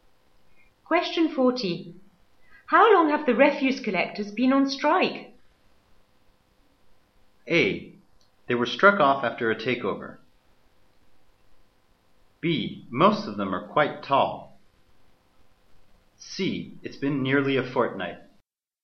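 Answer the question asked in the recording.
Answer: C: It's been nearly a fortnight.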